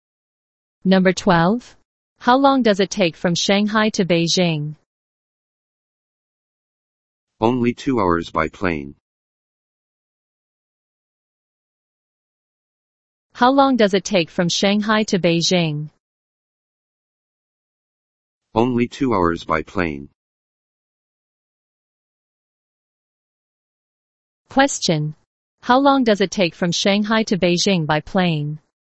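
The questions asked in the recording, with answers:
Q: Question. How long does it take from Shanghai to Beijing by plane?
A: Only 2 hours.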